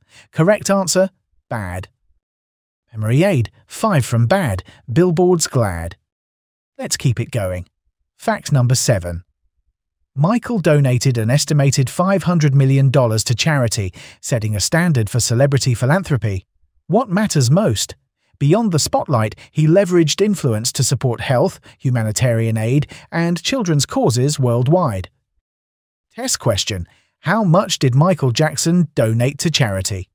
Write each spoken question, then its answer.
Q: How much did Michael Jackson donate to charity?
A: Correct answer. $500 million.